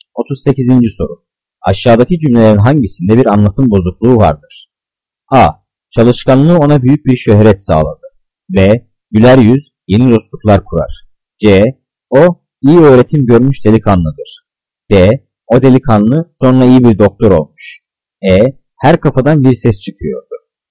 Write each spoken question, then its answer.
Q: Aşağıdaki cümlelerin hangisinde bir anlatım bozukluğu vardır?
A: Cevap C. O iyi öğretim görmüş delikanlıdır.